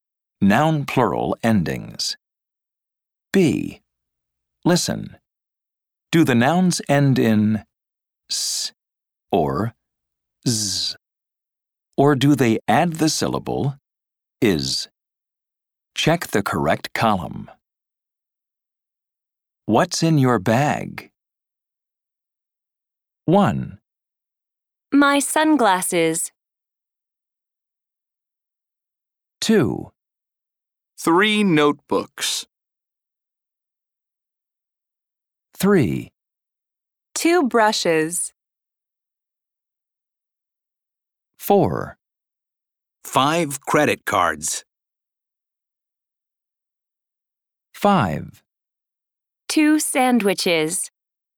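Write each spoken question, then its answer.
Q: My sunglasses.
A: adds the syllable is (/ɪz/)

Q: 2 brushes.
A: adds the syllable is (/ɪz/)

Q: 2 sandwiches.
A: adds the syllable is (/ɪz/)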